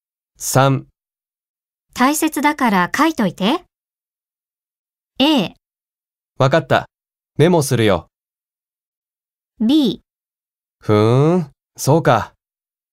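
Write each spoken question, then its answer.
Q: 大切だから書いといて。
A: A: わかった、メモするよ。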